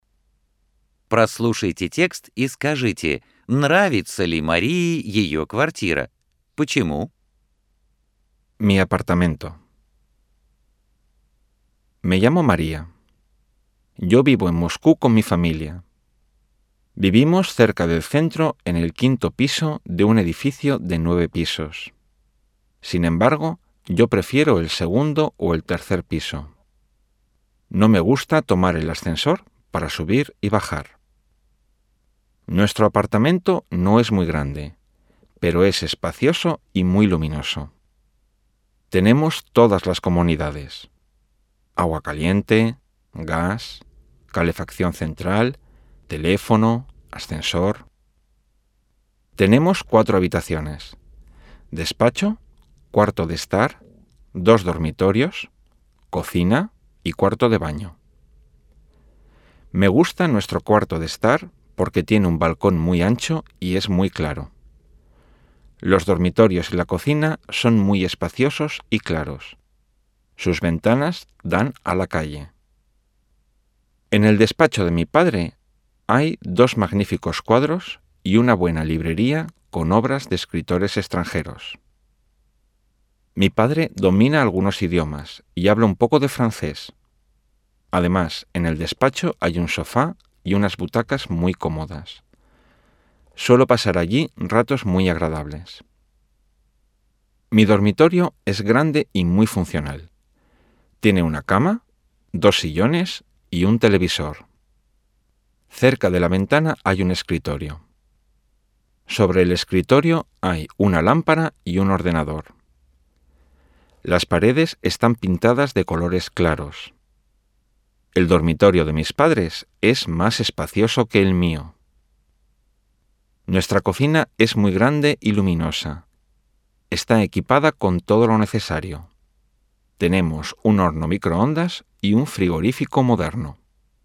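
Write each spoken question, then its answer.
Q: Прослушайте текст и скажите, нравится ли Марии ее квартира?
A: Да, нравится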